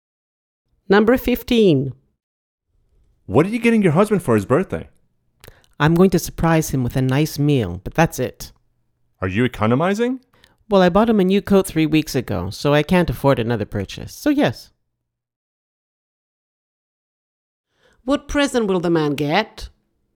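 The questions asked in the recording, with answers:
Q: What present will the man get?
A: A nice meal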